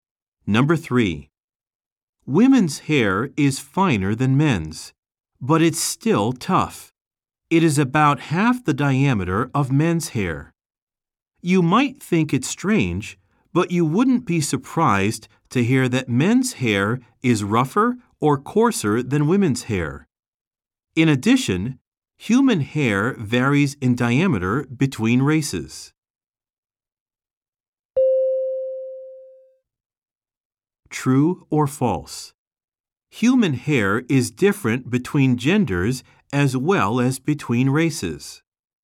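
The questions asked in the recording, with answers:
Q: True or false? Human hair is different between genders as well as between races.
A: True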